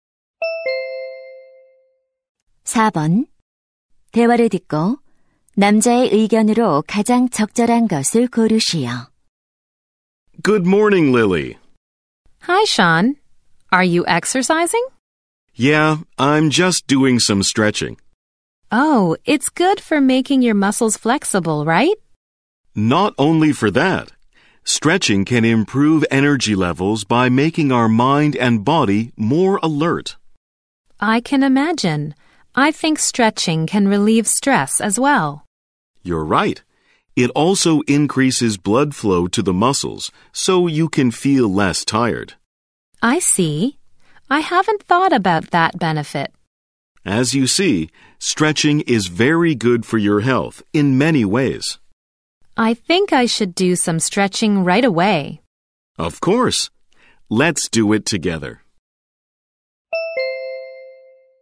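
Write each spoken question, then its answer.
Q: 대화를 듣고 남자의 의견으로 가장 적절한 것을 고르시오.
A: 스트레칭은 여러 면에서 건강에 좋다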